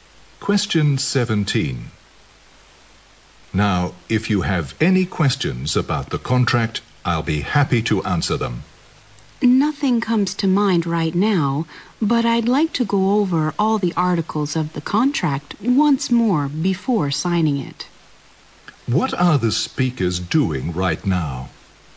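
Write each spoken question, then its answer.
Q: What are the speakers doing right now?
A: Talking about a contract before signing it.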